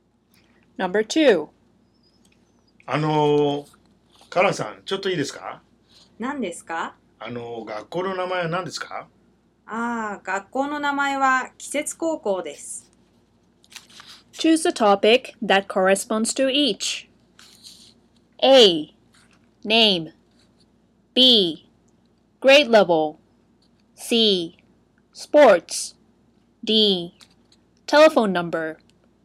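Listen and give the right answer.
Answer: A: Name.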